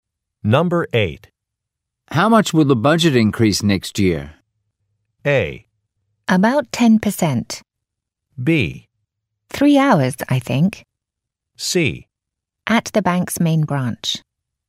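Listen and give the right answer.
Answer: A: About 10%.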